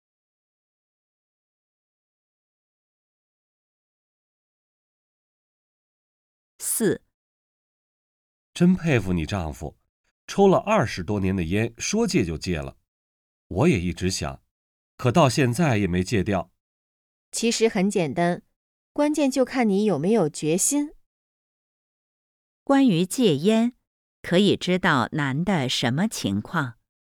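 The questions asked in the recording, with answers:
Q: 关于戒烟,可以知道男的什么情况?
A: 一直想戒烟,但还没戒掉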